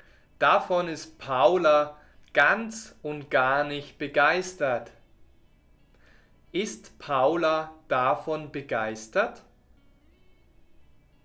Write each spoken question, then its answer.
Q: Ist Paula davon begeistert?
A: Nein, sie ist davon ganz und gar nicht begeistert.